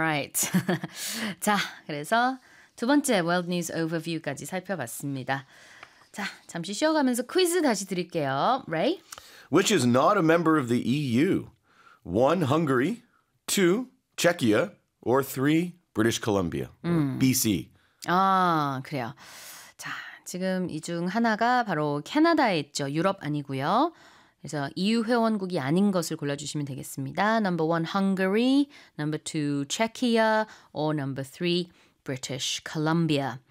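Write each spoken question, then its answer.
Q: Which is not a member of the EU?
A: 3: British Columbia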